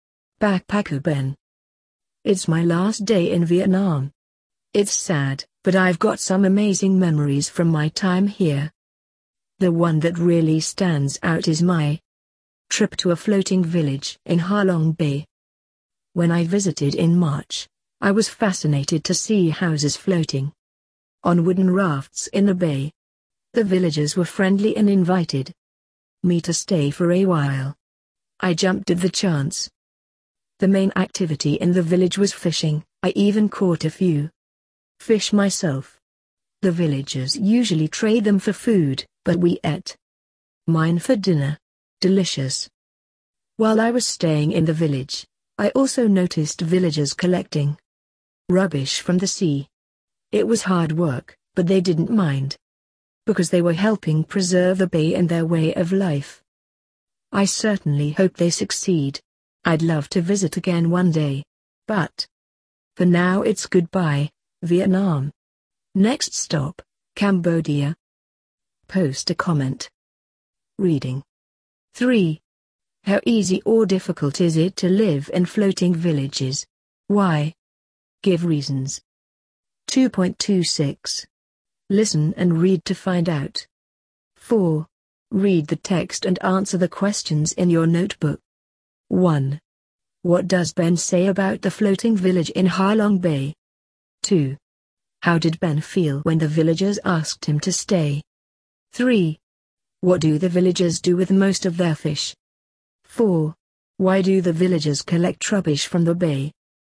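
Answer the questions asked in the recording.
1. It is his most memorable experience in Vietnam; houses float on wooden rafts
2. Very happy; he jumped at the chance
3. They trade them for food
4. To help preserve the bay and their way of life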